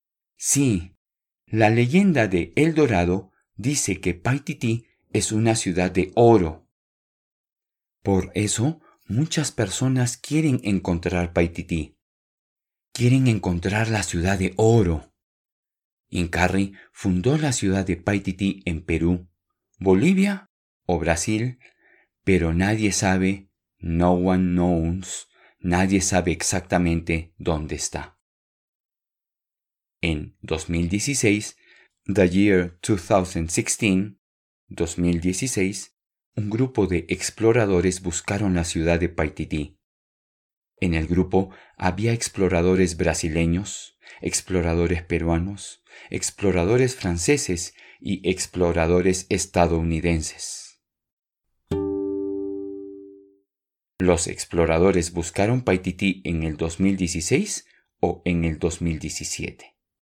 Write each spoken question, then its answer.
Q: Los exploradores buscaron Paititi en el 2016 o en el 2017.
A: Sí, en el 2016.